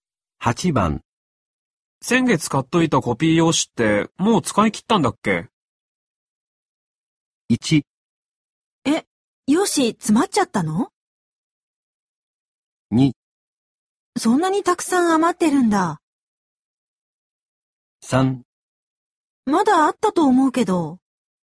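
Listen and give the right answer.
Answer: 3: まだあったと思うけど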